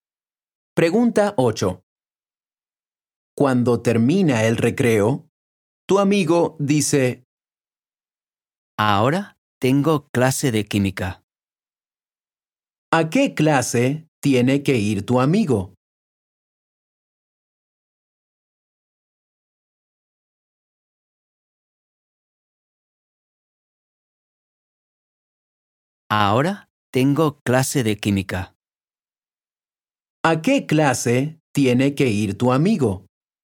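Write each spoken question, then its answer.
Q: ¿A qué clase tiene que ir tu amigo?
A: a la clase de química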